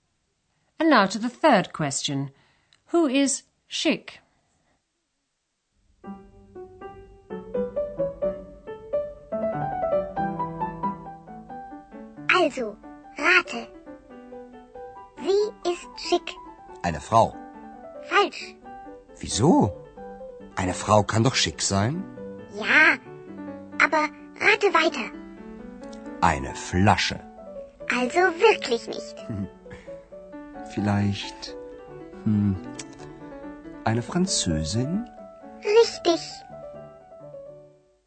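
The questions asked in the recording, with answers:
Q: Who is Schick?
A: A French woman (eine Französin)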